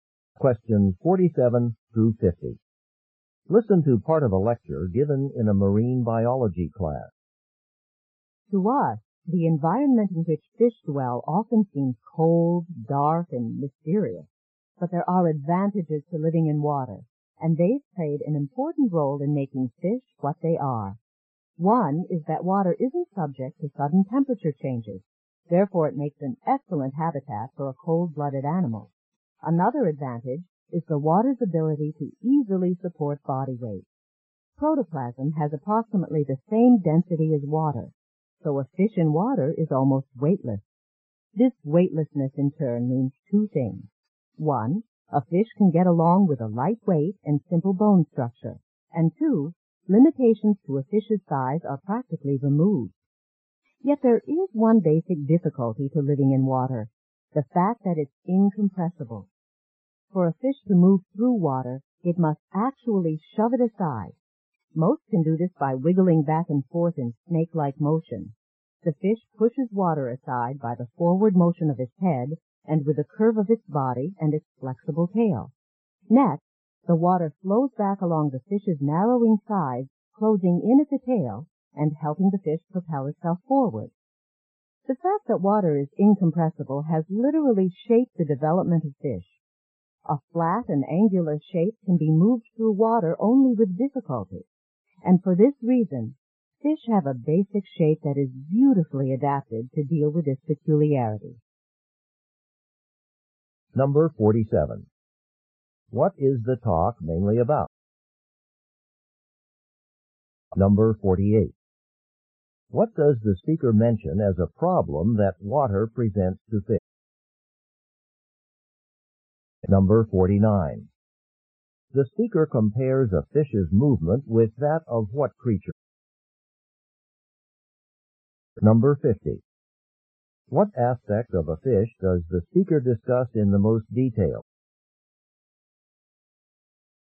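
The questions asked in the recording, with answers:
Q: What is the talk mainly about?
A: How living in water has shaped fish

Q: What does the speaker mention as a problem that water presents to fish?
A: Water is incompressible

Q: The speaker compares a fish's movement with that of what creature?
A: A snake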